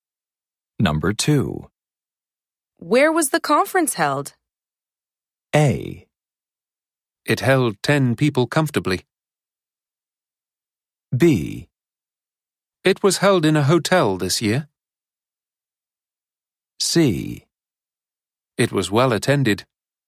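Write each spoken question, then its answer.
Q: Where was the conference held?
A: B: It was held in a hotel this year.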